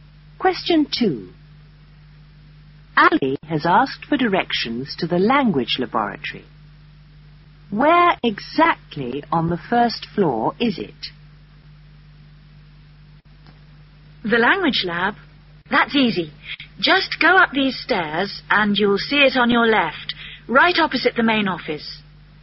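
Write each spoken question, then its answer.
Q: Where exactly on the first floor is it?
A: On the left, opposite the main office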